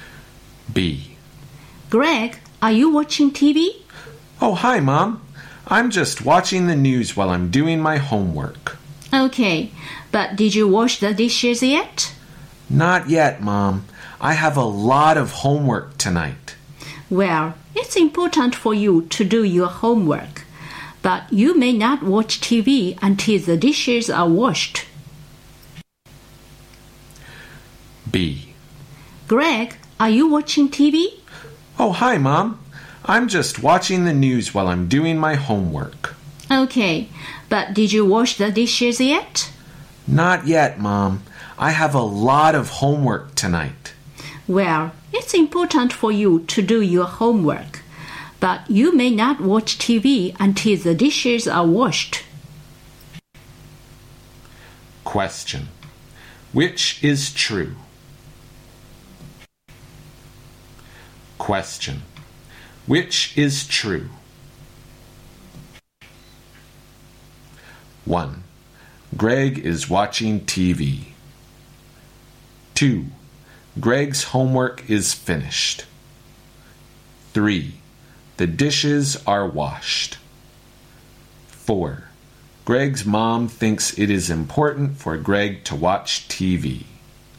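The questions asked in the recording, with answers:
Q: Which is true?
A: 1: Greg is watching TV.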